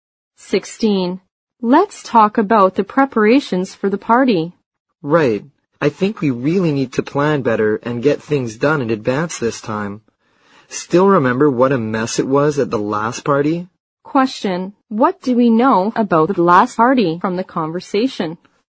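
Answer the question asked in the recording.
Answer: It was a mess because it wasn't planned well in advance.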